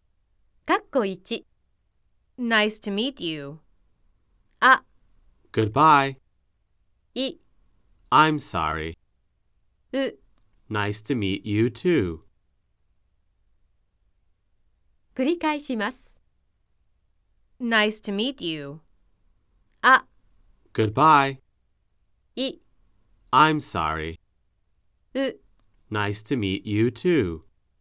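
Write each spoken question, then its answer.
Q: Nice to meet you.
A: う: Nice to meet you too.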